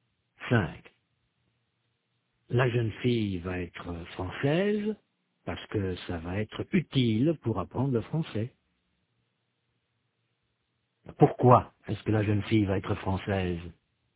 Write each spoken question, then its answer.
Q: Pourquoi est-ce que la jeune fille va être française?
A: Parce que ça va être utile pour apprendre le français.